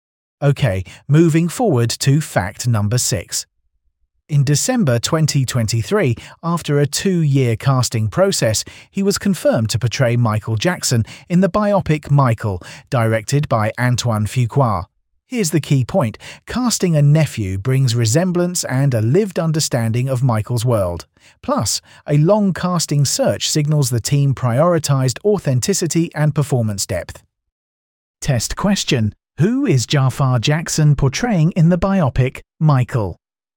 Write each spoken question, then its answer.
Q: Who is Jaafar Jackson portraying in the biopic Michael?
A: Correct answer, Michael Jackson